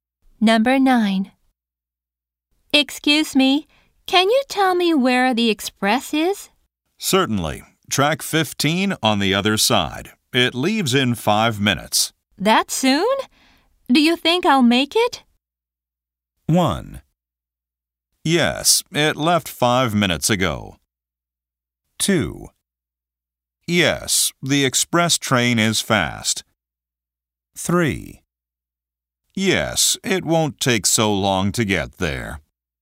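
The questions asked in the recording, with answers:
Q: That soon? Do you think I'll make it?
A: 3: Yes, it won't take so long to get there.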